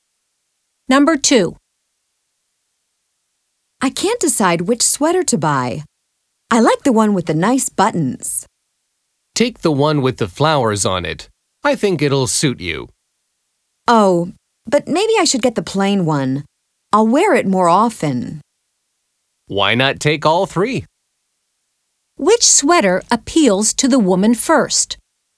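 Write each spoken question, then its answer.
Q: Which sweater appeals to the woman first?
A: the one with the nice buttons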